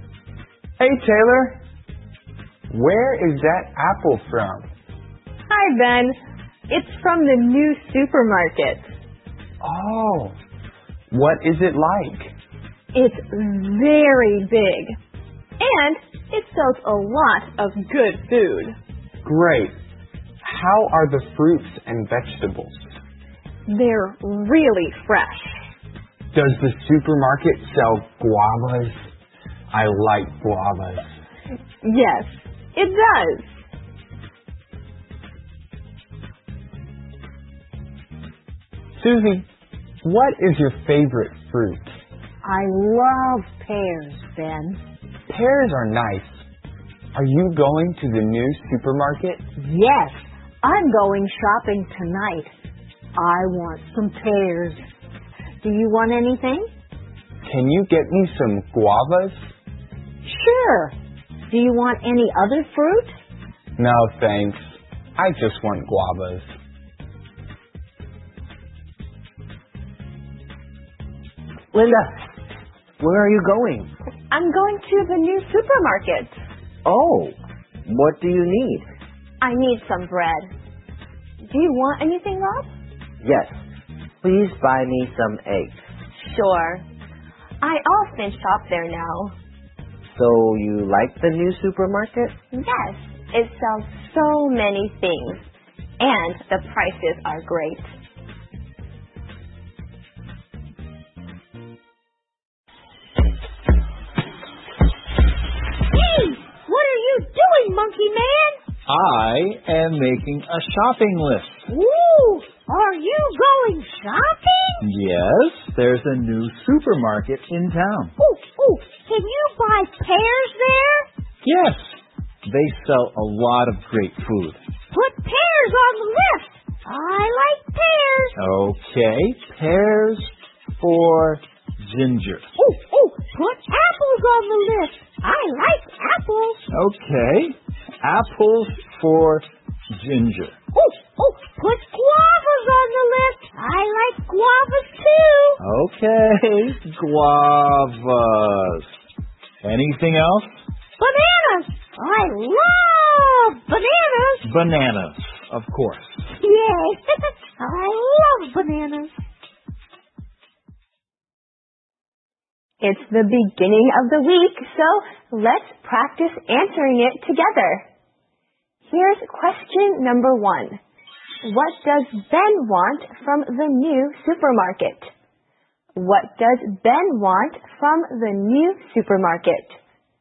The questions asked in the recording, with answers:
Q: What does Ben want from the new supermarket?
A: Ben wants some guavas.